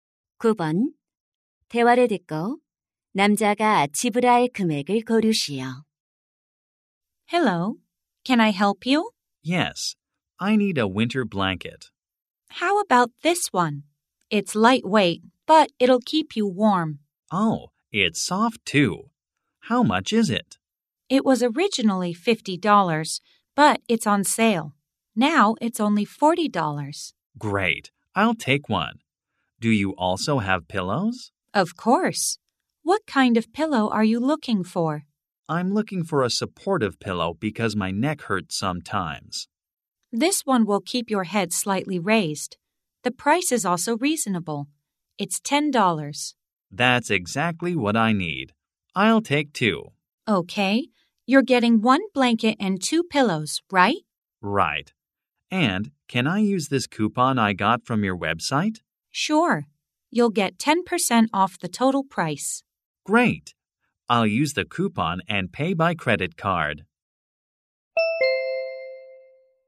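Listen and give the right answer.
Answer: 54달러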